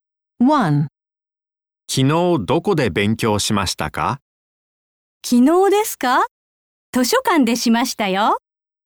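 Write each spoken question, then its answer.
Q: 昨日どこで勉強しましたか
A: 図書館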